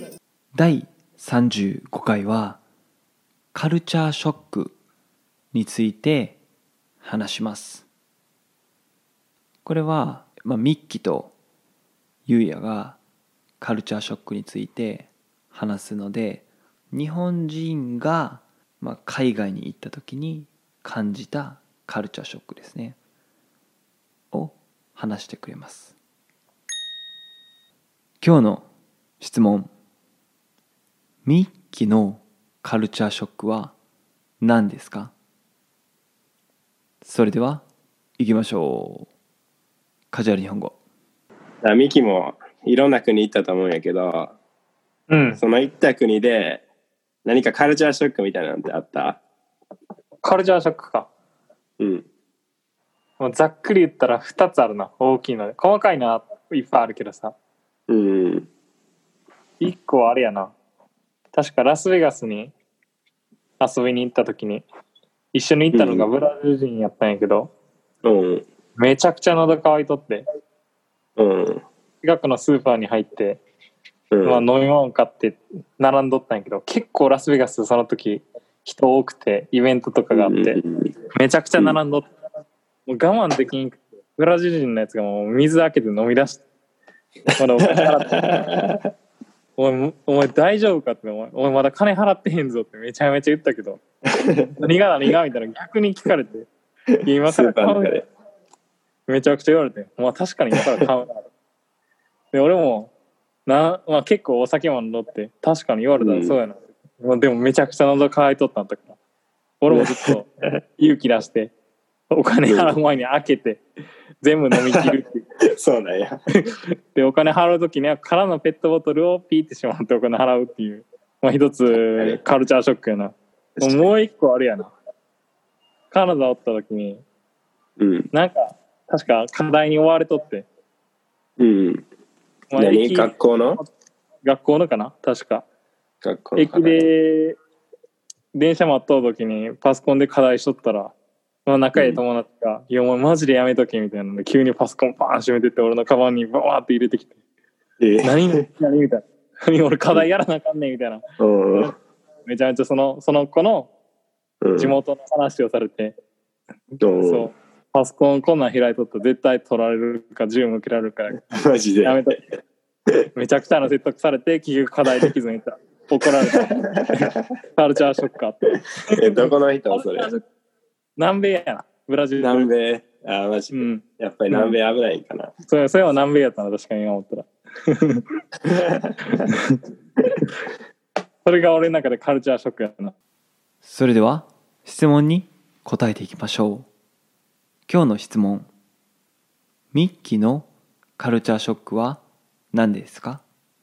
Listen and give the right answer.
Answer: 答え、今回は、2つあると言ってましたね。一つ目が、まあ、コンビニエンスストアとかで水を買う前にもう全部飲んでしまうこと。